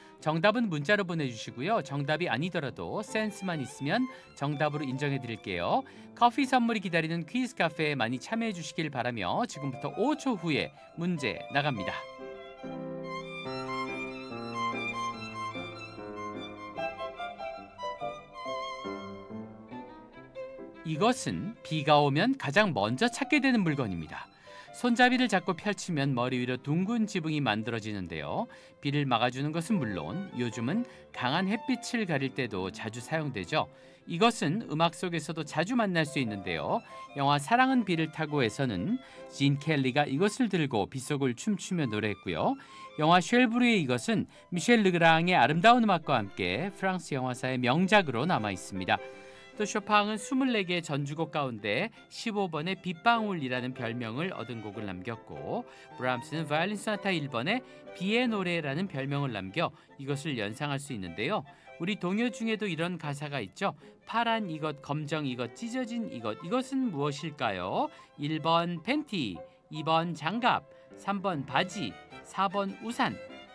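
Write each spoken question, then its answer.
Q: 파란 이것, 검정 이것, 찢어진 이것, 이것은 무엇일까요?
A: 4번: 우산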